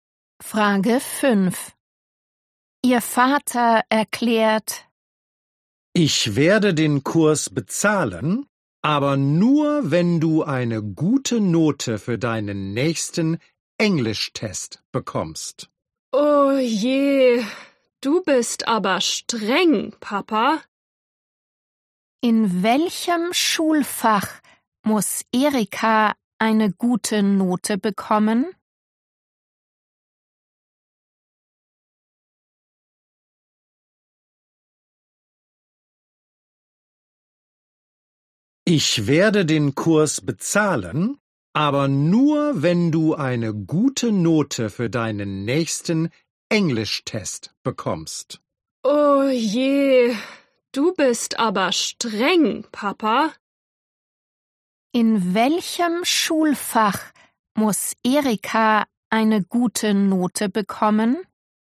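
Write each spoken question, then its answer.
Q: In welchem Schulfach muss Erika eine gute Note bekommen?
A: Englisch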